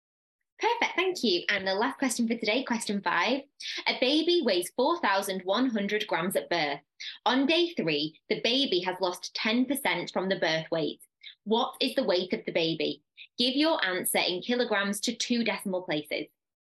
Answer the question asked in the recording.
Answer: that's going to give you 3.69 kilograms